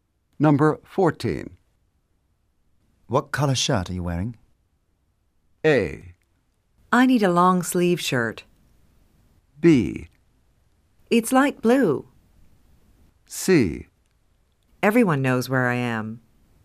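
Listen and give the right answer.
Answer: B: It's light blue.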